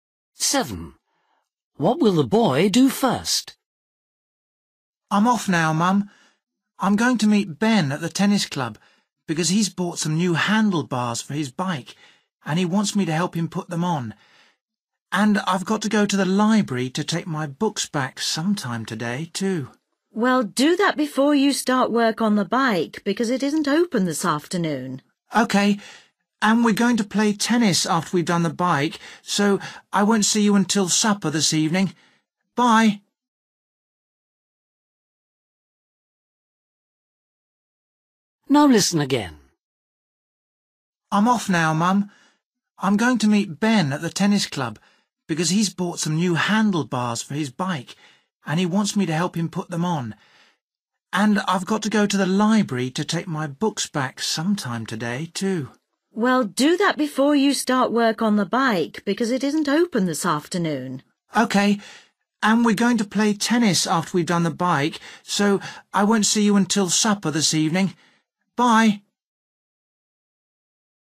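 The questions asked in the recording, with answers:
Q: What will the boy do first?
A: Take his books back to the library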